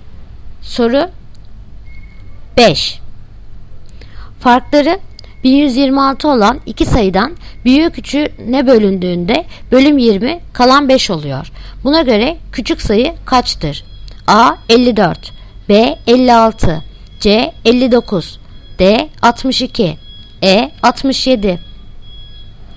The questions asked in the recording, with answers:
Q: Buna göre küçük sayı kaçtır?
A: Yanıt Ceyhan 59.